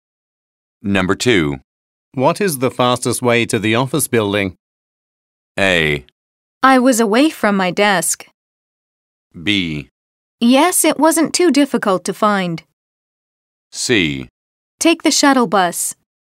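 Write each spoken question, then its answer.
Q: What is the fastest way to the office building?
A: C: Take the shuttle bus.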